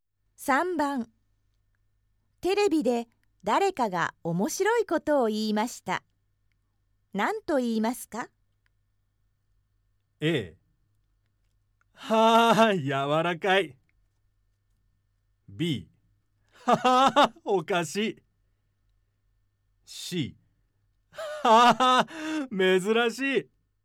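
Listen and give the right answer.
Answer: B: はあ、おかしい。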